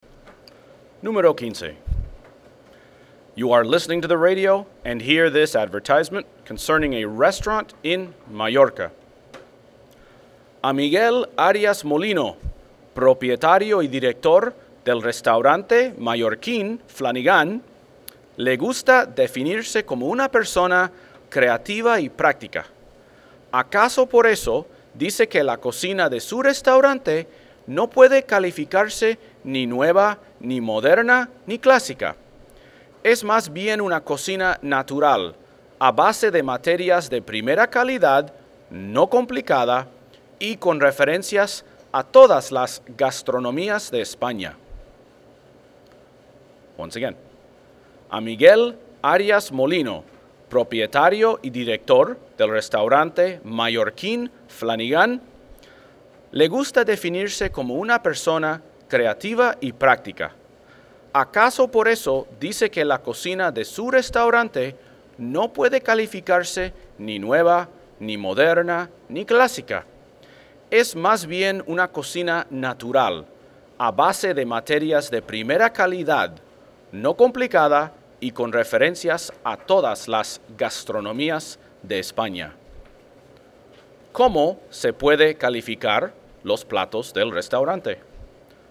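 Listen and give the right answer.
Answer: Cocina natural, con ingredientes de primera calidad, sencilla y con referencias a todas las gastronomías de España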